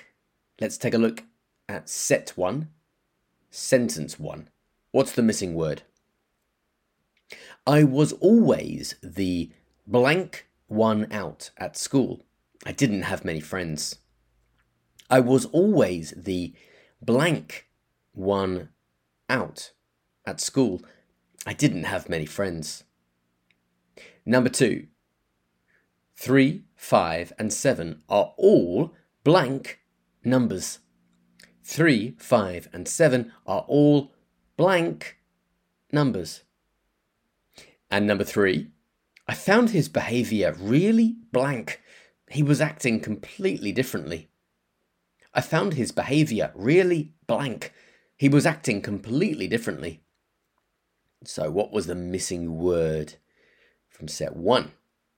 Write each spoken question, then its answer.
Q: So what was the missing word from set one?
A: So the missing word from set one is odd.